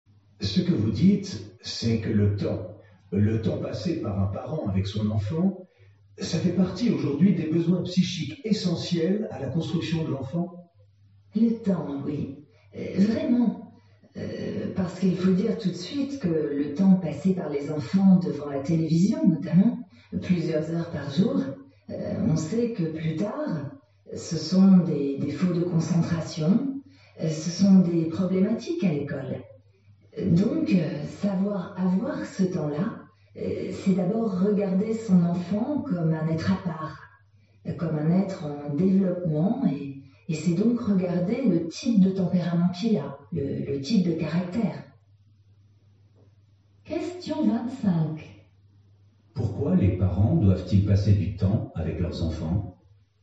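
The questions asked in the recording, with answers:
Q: Pourquoi les parents doivent-ils passer du temps avec leurs enfants ?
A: Parce que c'est un besoin psychique essentiel à la construction de l'enfant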